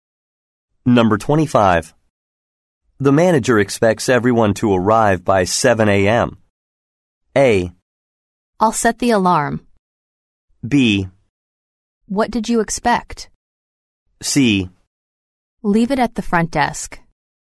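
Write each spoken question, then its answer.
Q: The manager expects everyone to arrive by 7 a.m.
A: A: I'll set the alarm.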